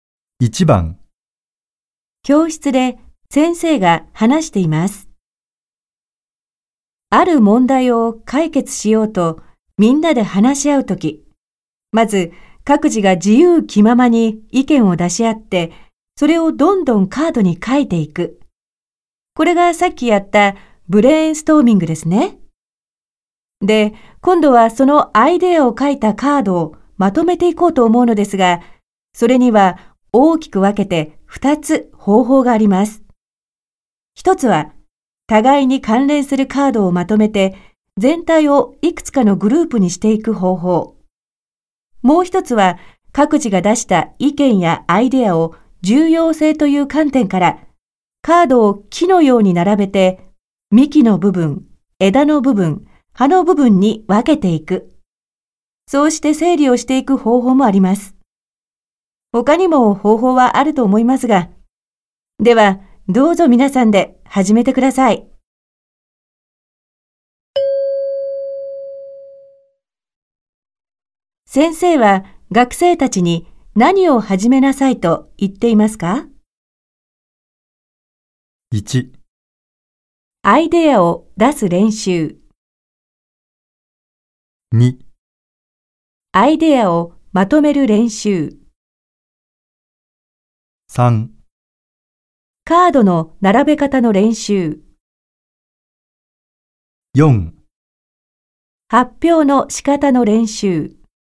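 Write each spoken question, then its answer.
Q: 先生は学生たちに何を始めなさいと言っていますか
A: 2: アイデアをまとめる練習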